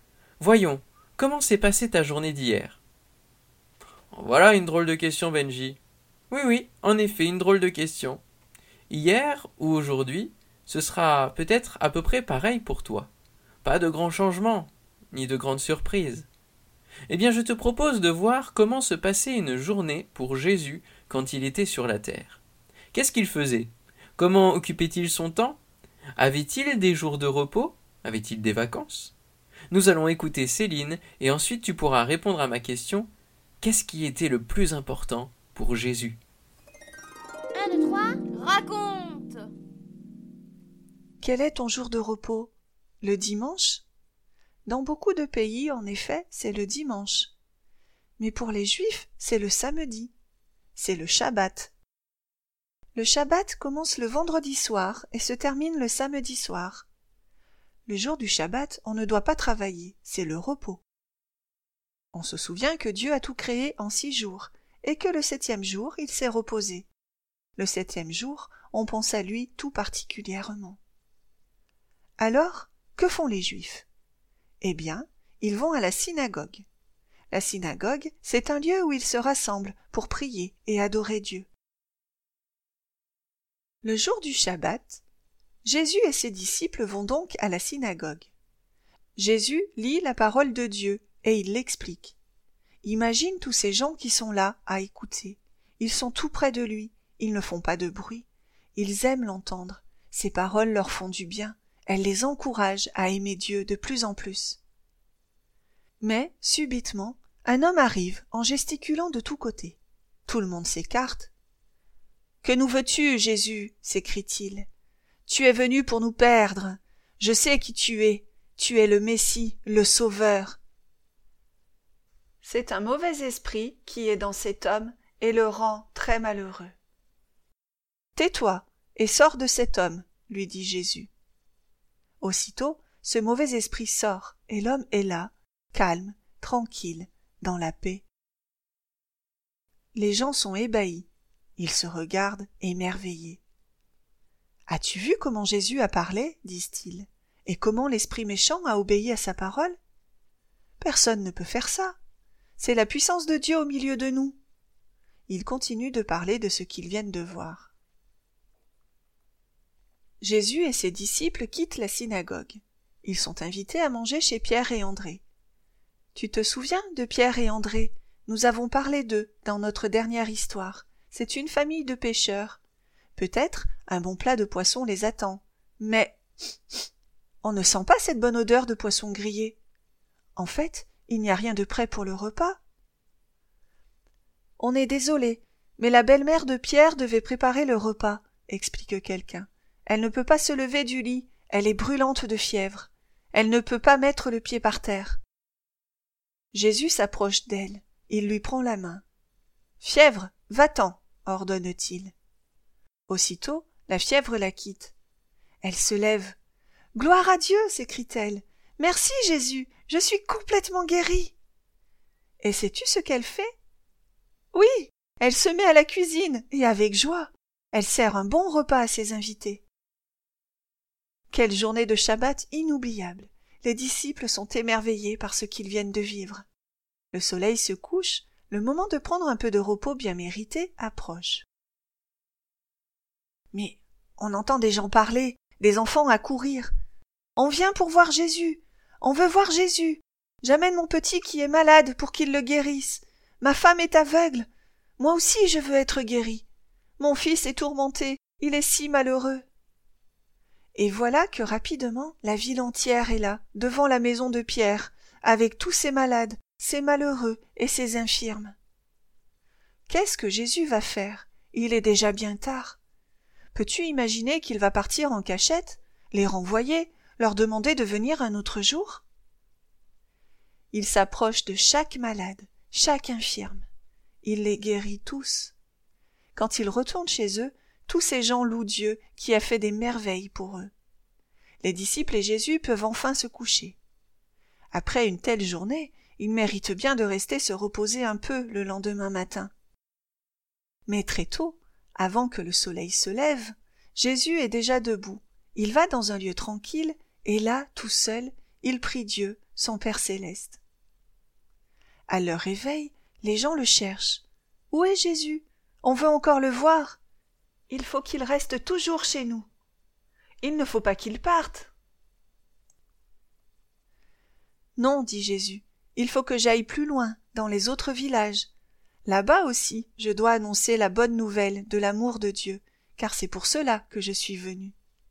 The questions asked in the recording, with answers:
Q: Qu'est-ce qui était le plus important pour Jésus?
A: Car pour lui, ce qui est le plus important, c'est de nous faire du bien, de faire du bien aux hommes pour qu'ils sachent que Dieu les aime.